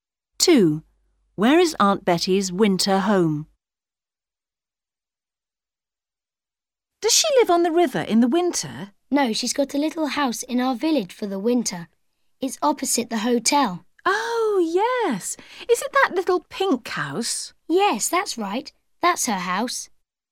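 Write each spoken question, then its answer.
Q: Where is Aunt Betty's winter home?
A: In a little pink house in the village, opposite the hotel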